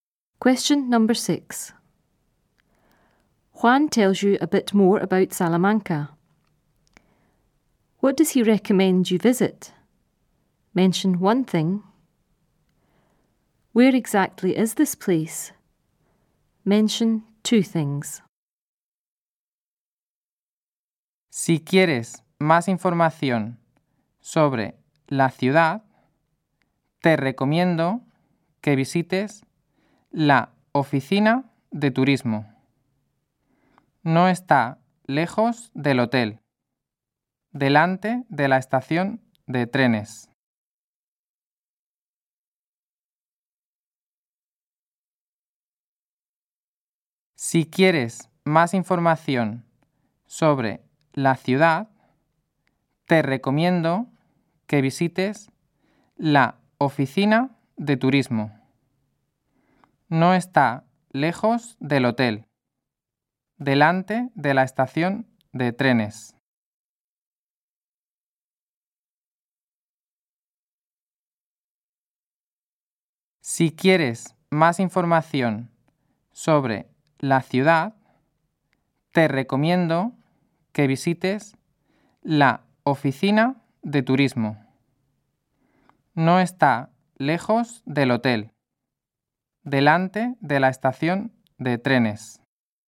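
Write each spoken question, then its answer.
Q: What does he recommend you visit?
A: The tourist office

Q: Where exactly is this place?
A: Not far from the hotel, in front of the train station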